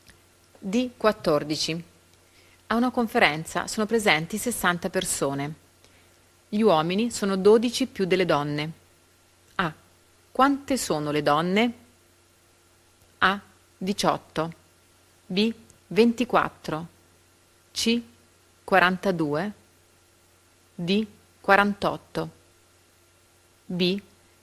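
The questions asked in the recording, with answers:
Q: Quante sono le donne?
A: B: 24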